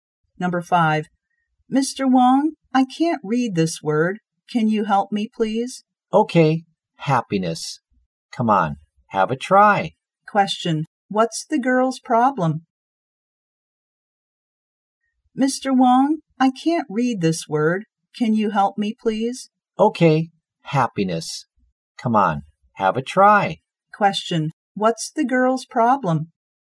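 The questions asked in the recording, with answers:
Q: what's the girl's problem?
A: She can't read a word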